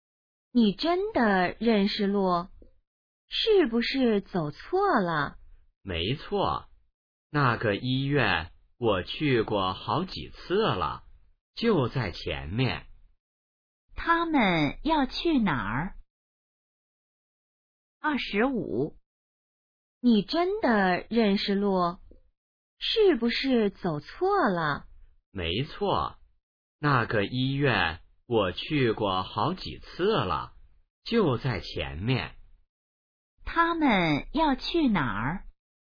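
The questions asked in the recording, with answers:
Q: 他们要去哪儿?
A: 医院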